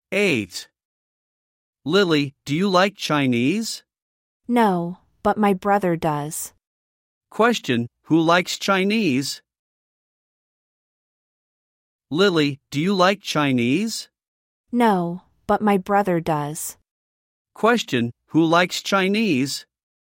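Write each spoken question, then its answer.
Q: Question, who likes Chinese?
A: Lily's brother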